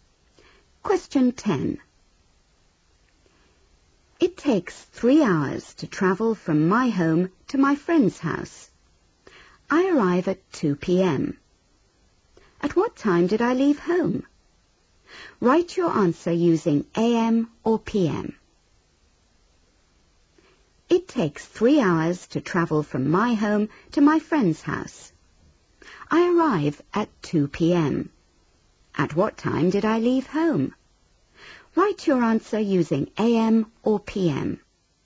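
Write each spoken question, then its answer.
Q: At what time did I leave home?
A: 11 a.m.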